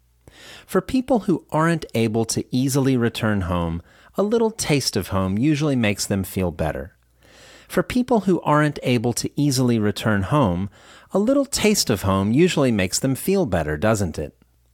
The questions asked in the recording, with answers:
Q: For people who aren't able to easily return home, a little taste of home usually makes them feel better, doesn't it?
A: Yes, it does. A little taste of home usually makes them feel better.